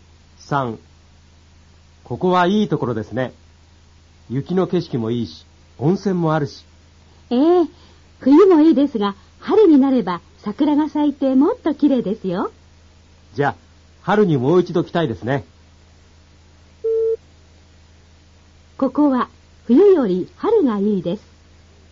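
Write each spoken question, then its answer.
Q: ここは冬より春がいいです。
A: 正しい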